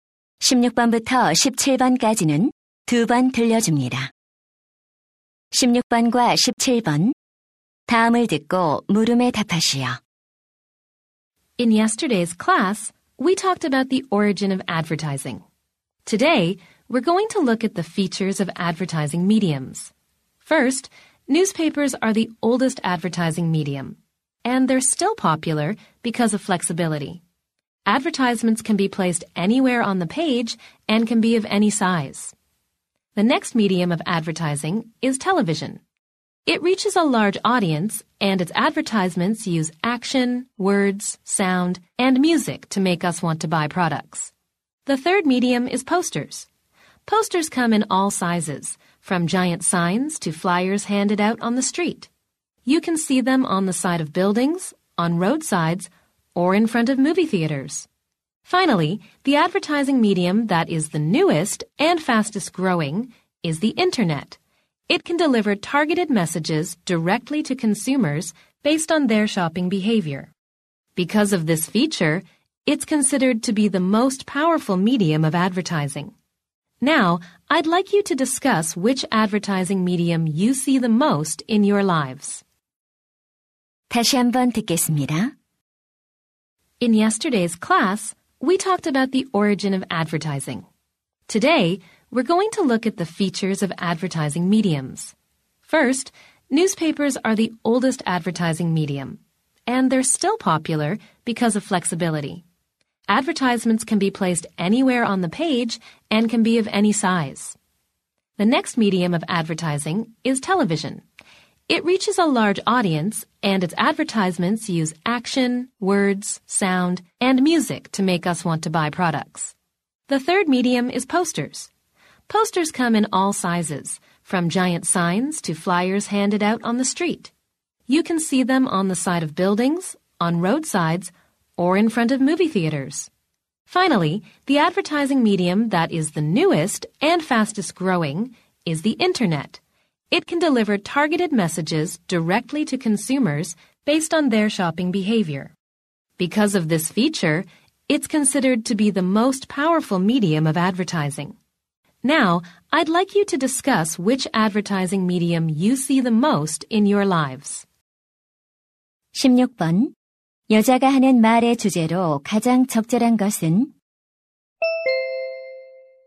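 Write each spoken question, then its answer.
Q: 여자가 하는 말의 주제로 가장 적절한 것은?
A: 광고 매체들의 특징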